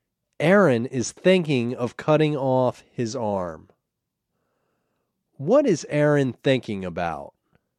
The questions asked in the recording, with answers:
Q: What is Aaron thinking about?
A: Aaron is thinking about cutting off his arm.